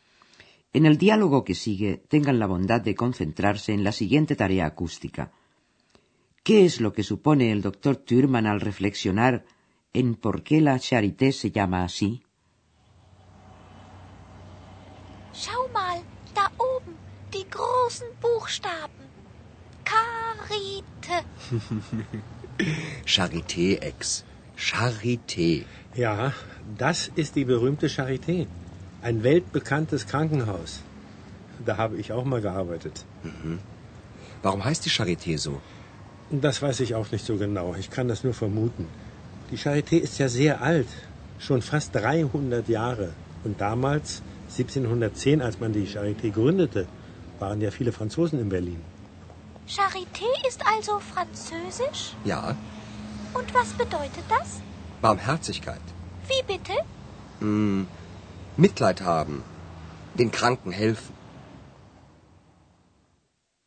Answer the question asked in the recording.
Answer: El doctor Thürmann supone que es por ello por lo que la Charité recibió un nombre francés.